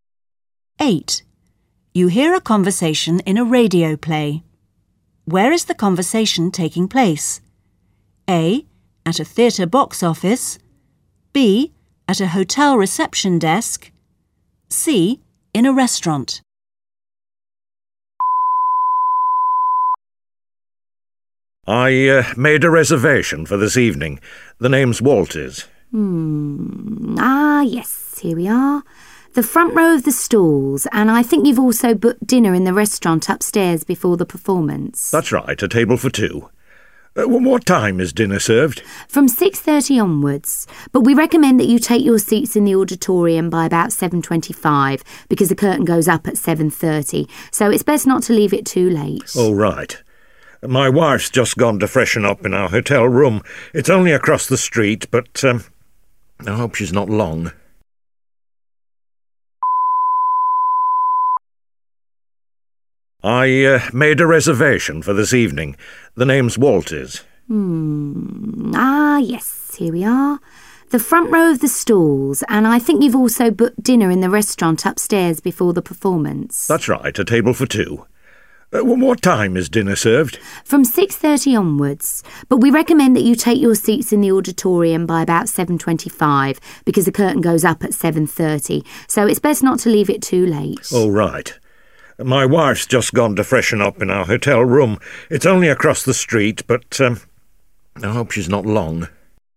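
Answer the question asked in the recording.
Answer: A: At a theatre box office.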